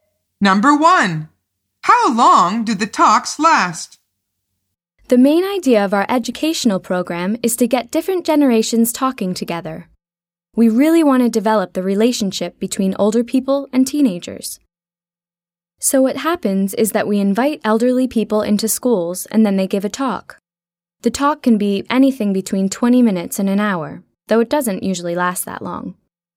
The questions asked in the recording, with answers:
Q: how long do the talks last?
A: The answer is between 20 minutes and an hour.